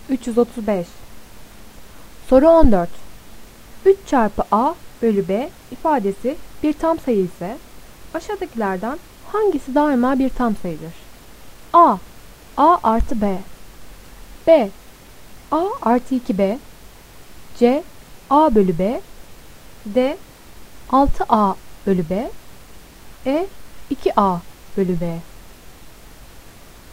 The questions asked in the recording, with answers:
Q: 3 çarpı A bölü B ifadesi bir tam sayı ise aşağıdakilerden hangisi daima bir tam sayıdır?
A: Doğru cevap D. 6A bölü B.